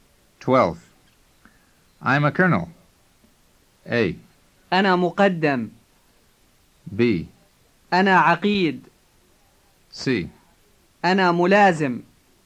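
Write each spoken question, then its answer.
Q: I'm a colonel.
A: B: أنا عقيد.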